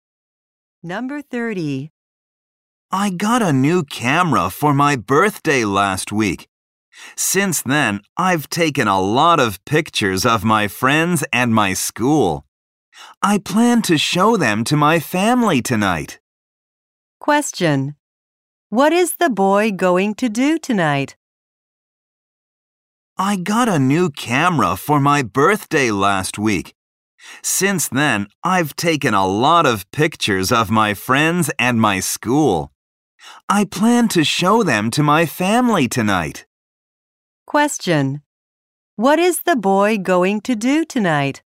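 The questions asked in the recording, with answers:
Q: Question. What is the boy going to do tonight?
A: Show his pictures to his family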